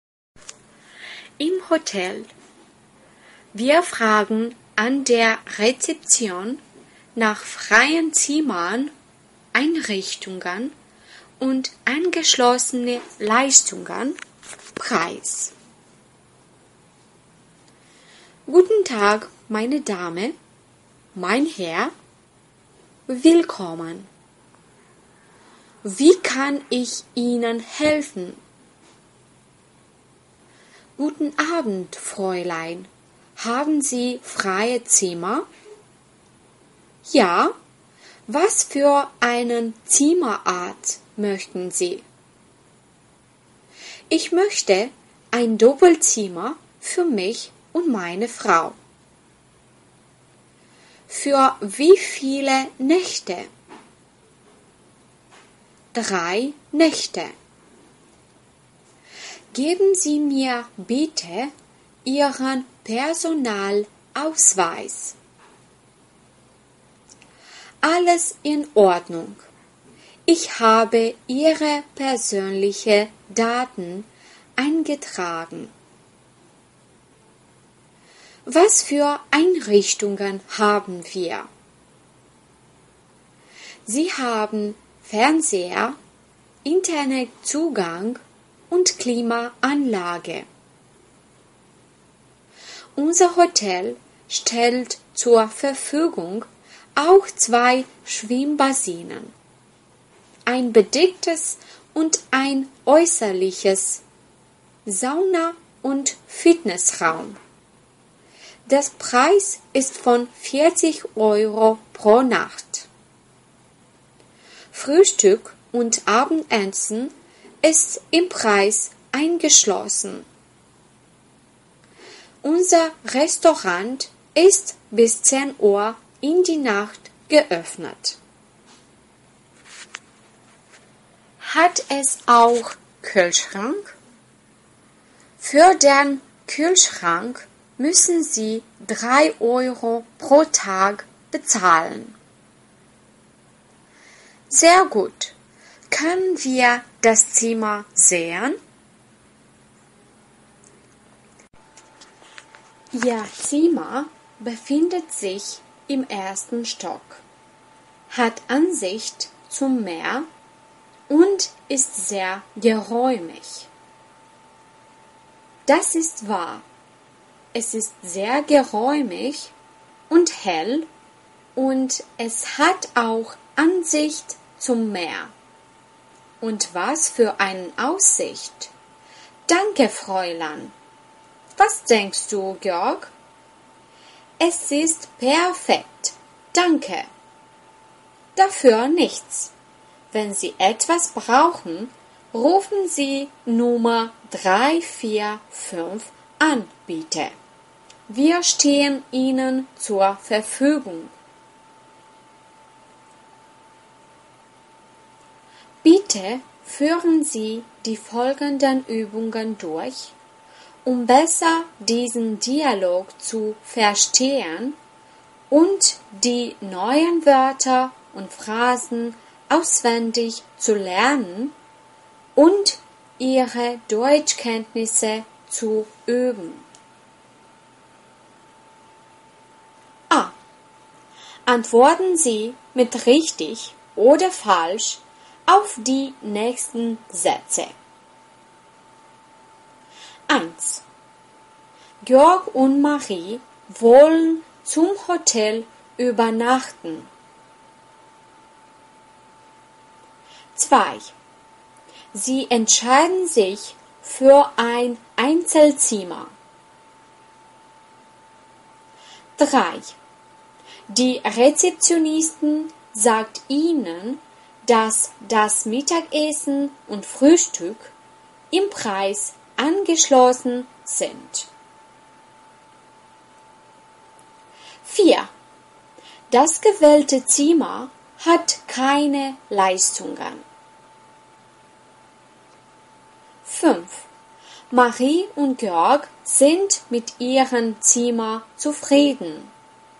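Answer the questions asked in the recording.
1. richtig
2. falsch
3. falsch
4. falsch
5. richtig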